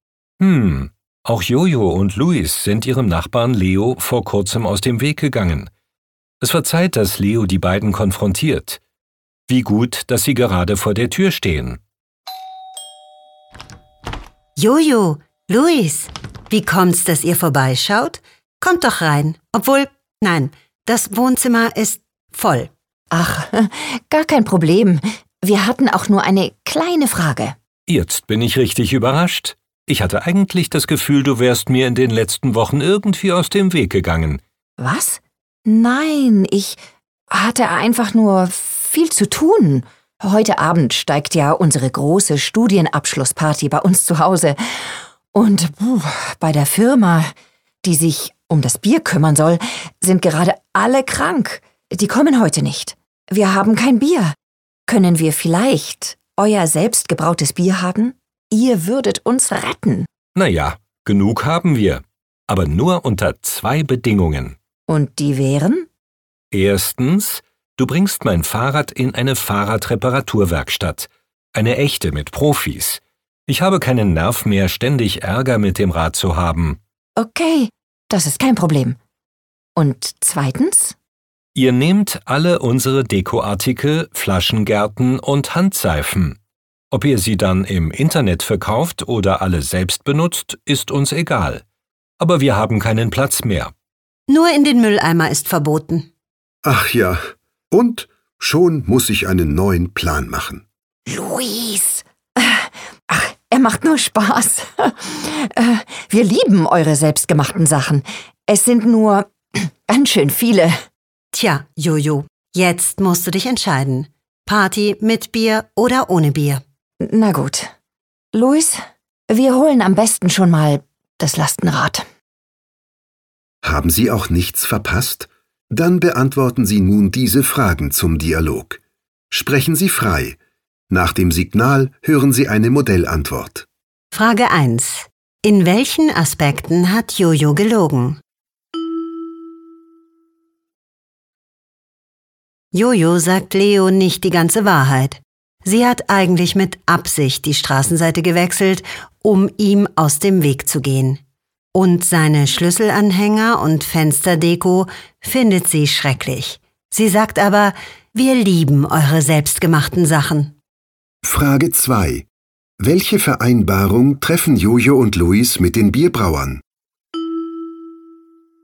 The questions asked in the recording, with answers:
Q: In welchen Aspekten hat Jojo gelogen?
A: Jojo sagt Leo nicht die ganze Wahrheit.

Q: Welche Vereinbarung treffen Jojo und Luis mit den Bierbrauern?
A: Sie bekommen selbst gebrautes Bier für ihre Party.